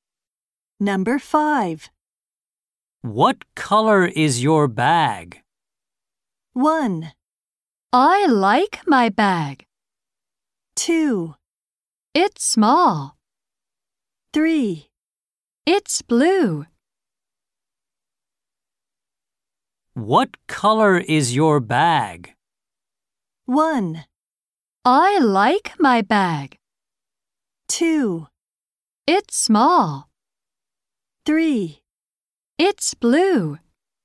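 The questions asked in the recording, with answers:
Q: What color is your bag?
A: 3: It's blue.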